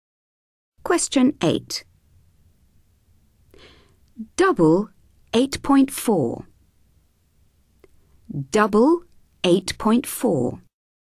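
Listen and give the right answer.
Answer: 16.8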